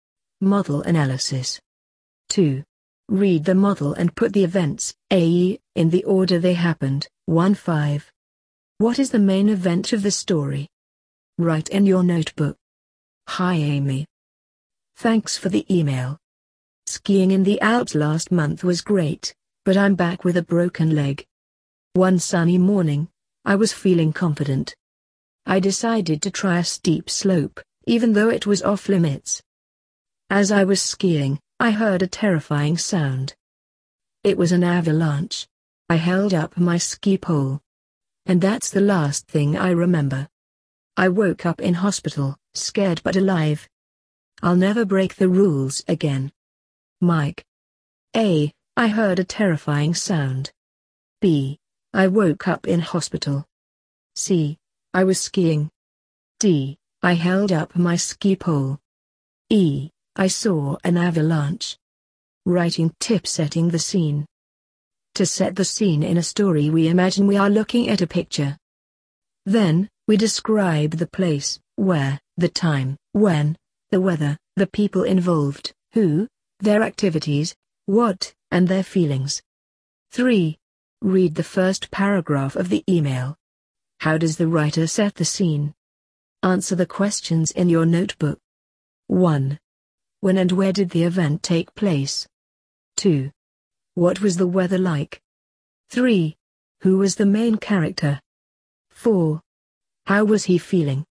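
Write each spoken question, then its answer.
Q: What is the main event of the story?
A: An avalanche hit him while he was skiing, and he woke up in hospital

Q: When and where did the event take place?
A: Last month, skiing in the Alps

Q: What was the weather like?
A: Sunny

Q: Who was the main character?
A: Mike, the writer

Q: How was he feeling?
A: Confident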